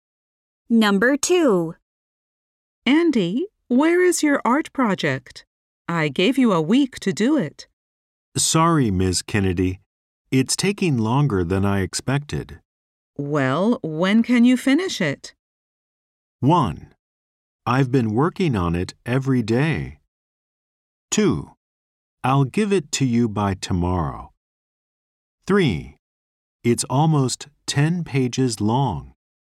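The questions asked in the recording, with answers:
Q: Well, when can you finish it?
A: 2: I'll give it to you by tomorrow.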